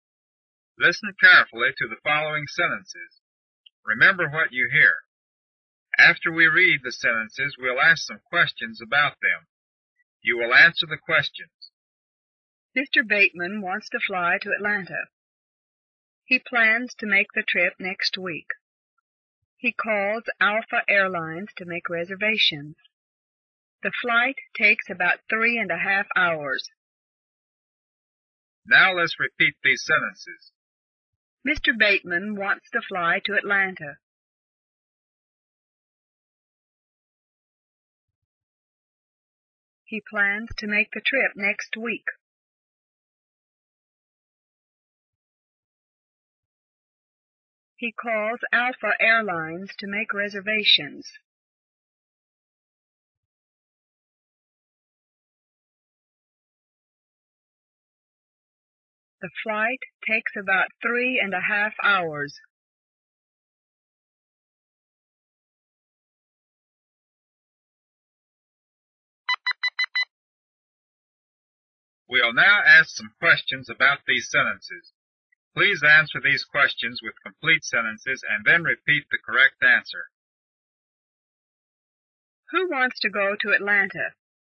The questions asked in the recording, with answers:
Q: Who wants to go to Atlanta?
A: Mr. Bateman wants to go to Atlanta.